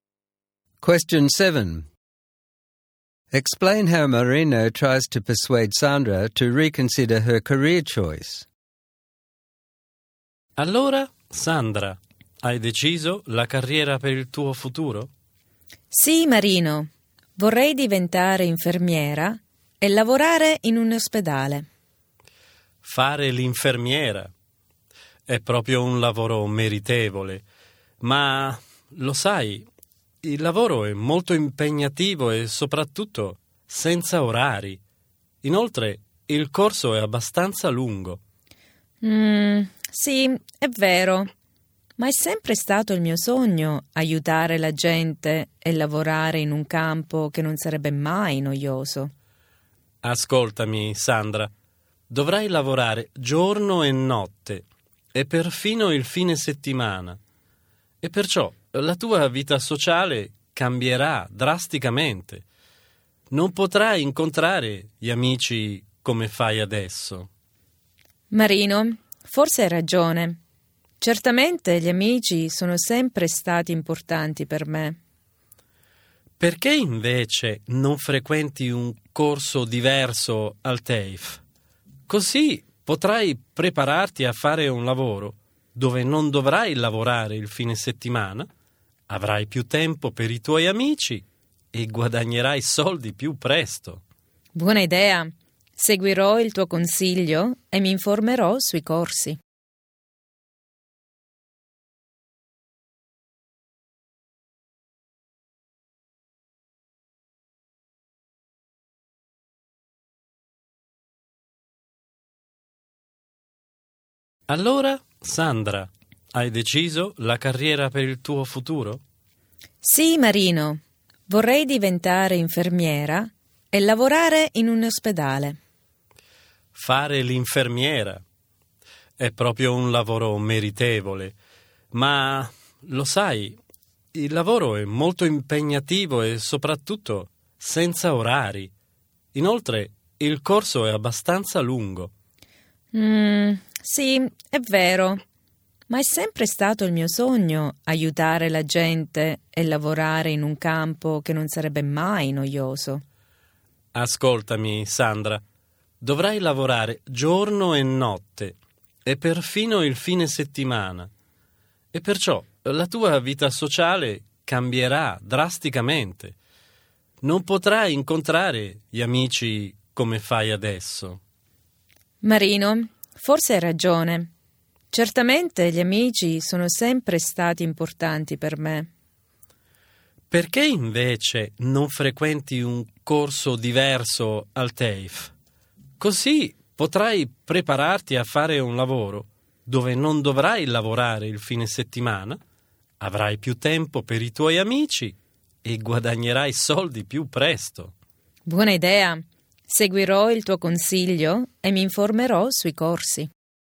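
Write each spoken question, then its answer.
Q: Explain how Marino tries to persuade Sandra to reconsider her career choice.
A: He says nursing is very demanding with no fixed hours and the course is long; she would work day and night and even weekends, so her social life would suffer. He suggests a different TAFE course, so she would have weekends free, more time for friends and would earn money sooner.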